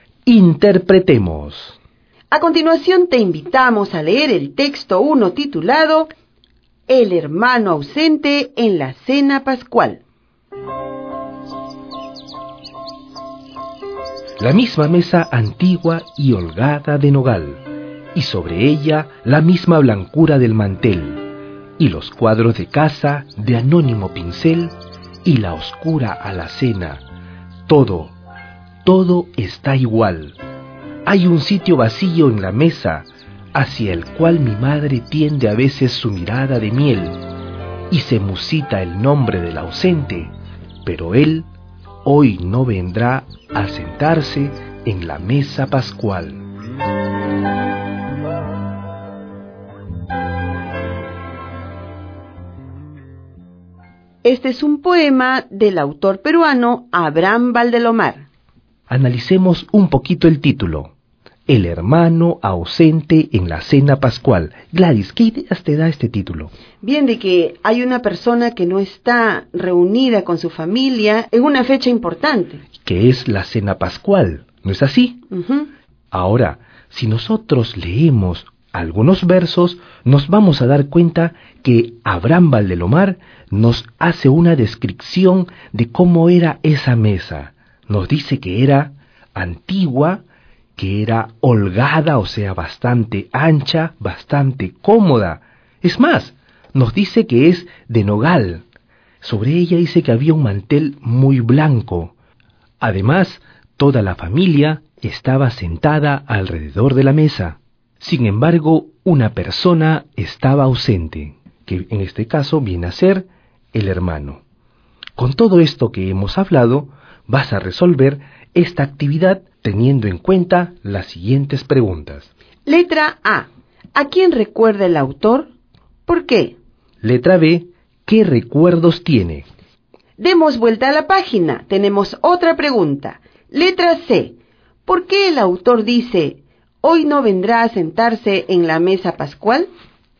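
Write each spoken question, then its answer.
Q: ¿A quién recuerda el autor?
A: A su hermano, que está ausente en la cena pascual

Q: ¿Qué recuerdos tiene?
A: La mesa antigua y holgada de nogal, el mantel blanco, los cuadros, la alacena y la familia reunida en la cena pascual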